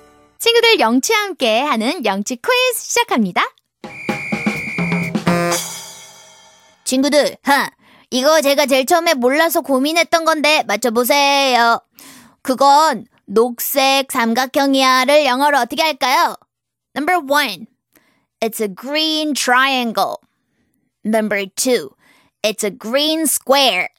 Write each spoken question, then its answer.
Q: 그건 녹색 삼각형이야를 영어로 어떻게 할까요?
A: 네, 여러분 정답은 Number one, it's a green triangle이죠.